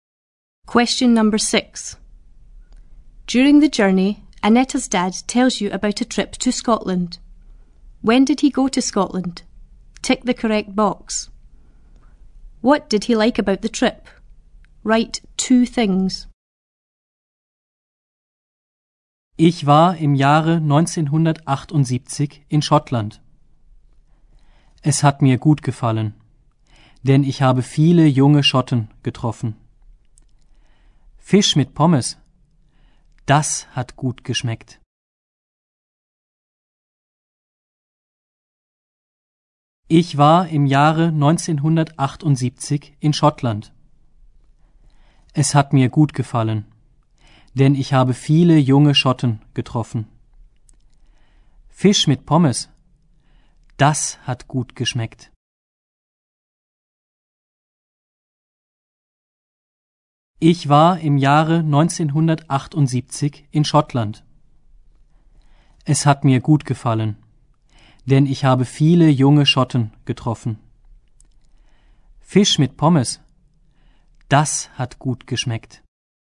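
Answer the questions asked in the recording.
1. In 1978
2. He met lots of young Scots; the fish and chips tasted good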